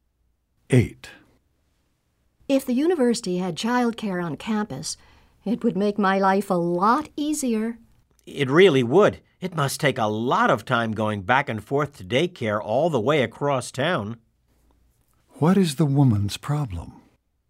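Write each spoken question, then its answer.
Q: What is the woman's problem?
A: There is no childcare on campus, so she travels far to daycare.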